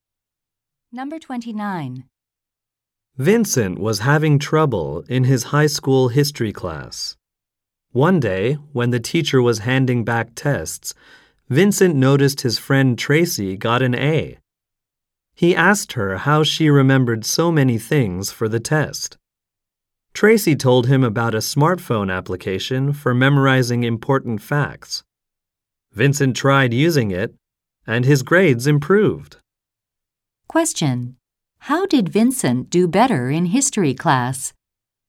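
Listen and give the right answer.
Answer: He used a smartphone app for memorizing facts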